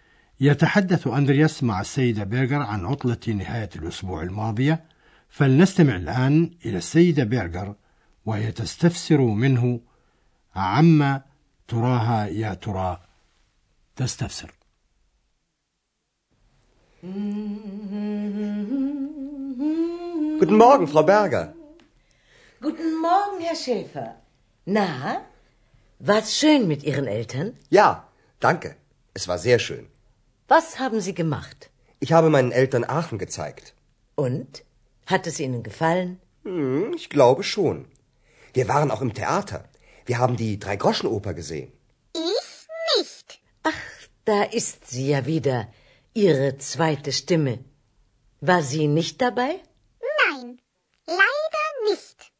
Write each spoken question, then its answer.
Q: فلنستمع الآن إلى السيدة بيرغر وهي تستفسر منه عما تراها يا ترى تستفسر.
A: تستفسر السيدة بيرغر من أندرياس عما قام به مع والديه وهل أعجبتهما مدينة آخن.